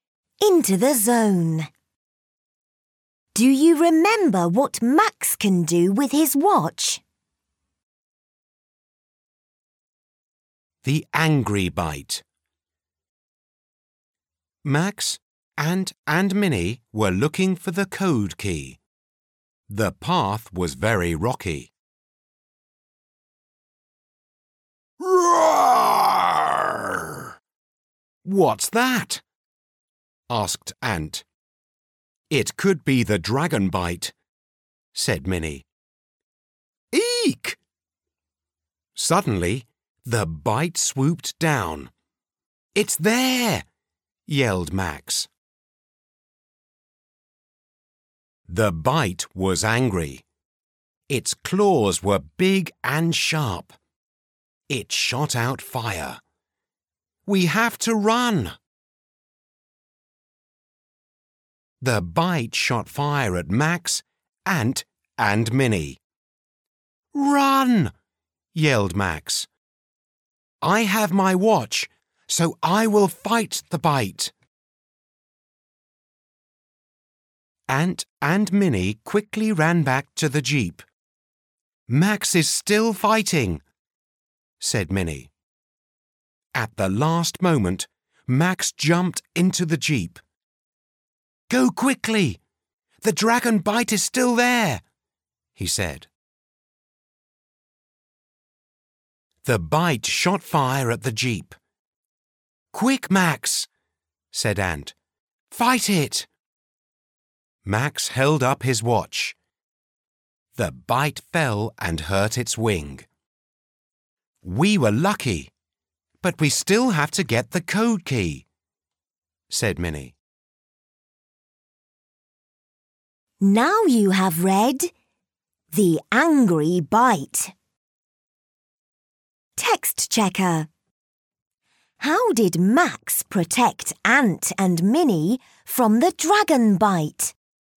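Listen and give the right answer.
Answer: He stayed to fight the bite with his watch, and when he held it up the bite fell and hurt its wing.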